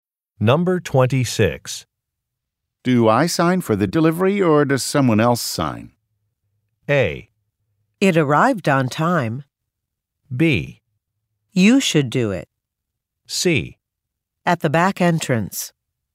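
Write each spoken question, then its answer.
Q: Do I sign for the delivery or does someone else sign?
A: B: You should do it.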